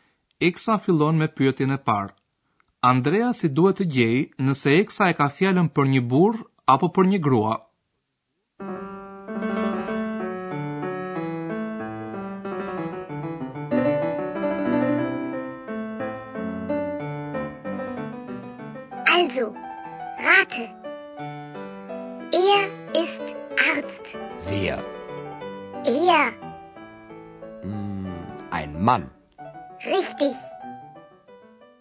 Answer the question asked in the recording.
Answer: Për emri Ea, përdoret në vënd të emrave mashkullor të cilët mund të jenë njerëz ose objekte.